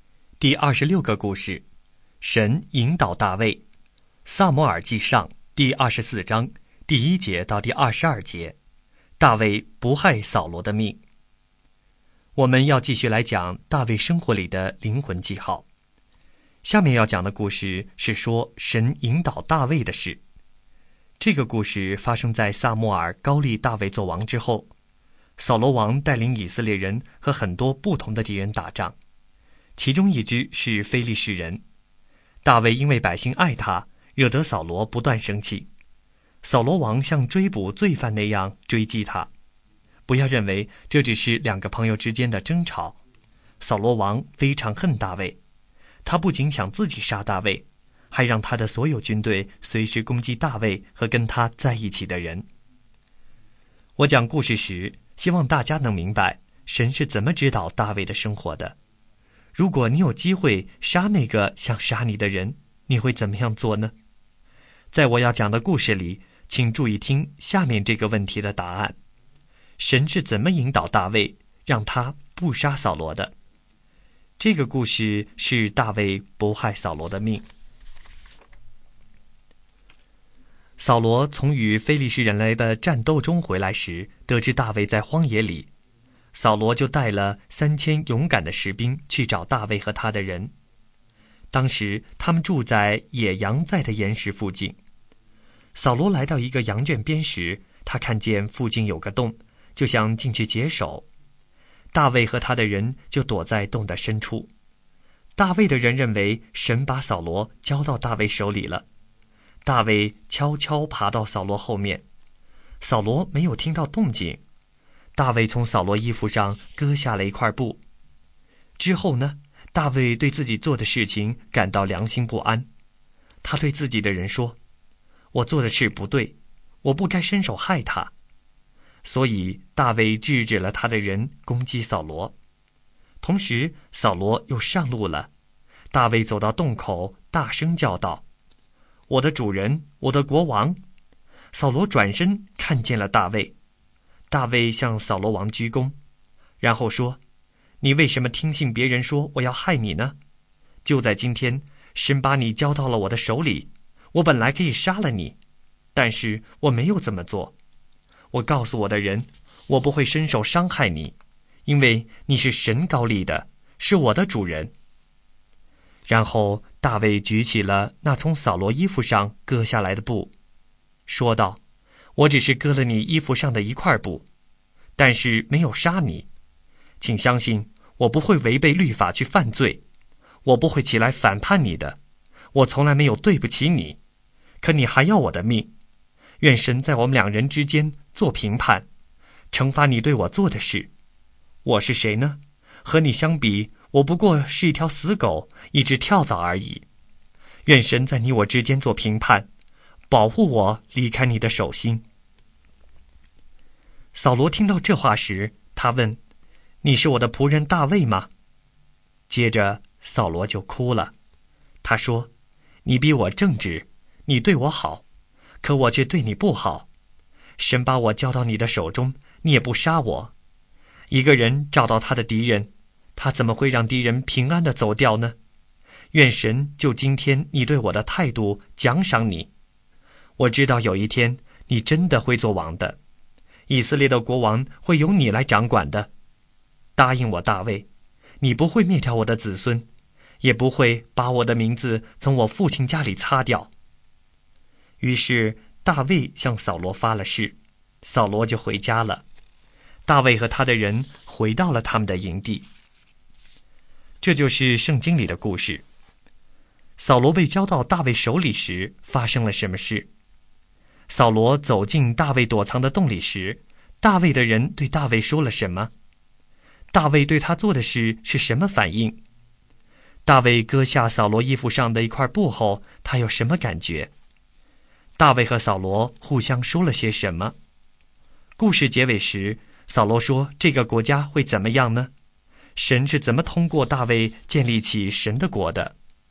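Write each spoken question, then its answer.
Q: 扫罗走进大卫躲藏的洞里时,大卫的人对大卫说了什么?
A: 神把扫罗交到大卫手里了

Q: 大卫割下扫罗衣服上的一块布后,他有什么感觉?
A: 良心不安,觉得自己做的不对

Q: 故事结尾时,扫罗说这个国家会怎么样呢?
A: 大卫会做王,掌管以色列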